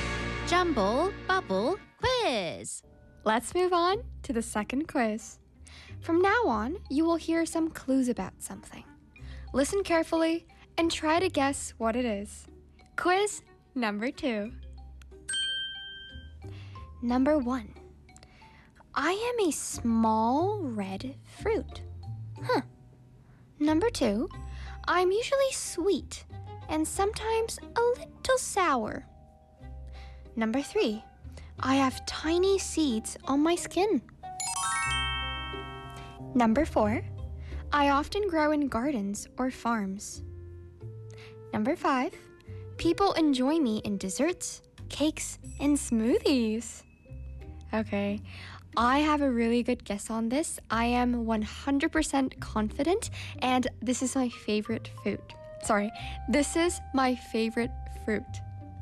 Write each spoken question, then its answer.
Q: Listen carefully and try to guess what it is.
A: The answer is a strawberry.